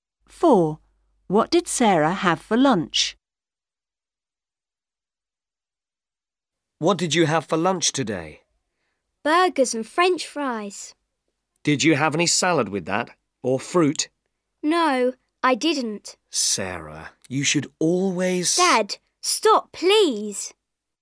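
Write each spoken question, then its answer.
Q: What did Sarah have for lunch?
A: Burgers and French fries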